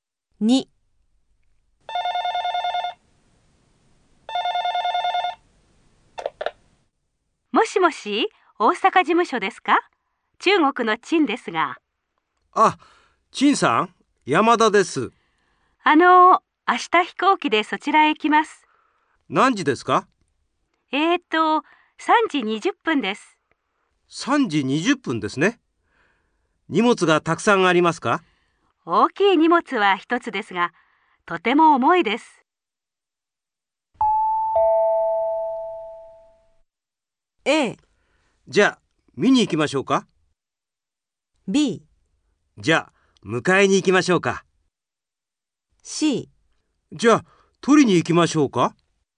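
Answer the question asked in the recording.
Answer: B: じゃあ迎えに行きましょうか。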